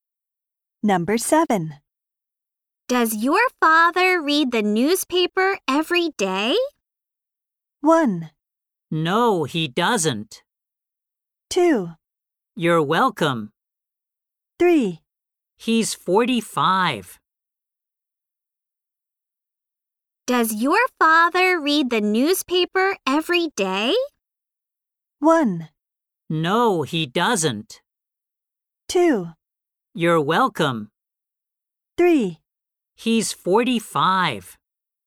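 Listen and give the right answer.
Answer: 1: No, he doesn't.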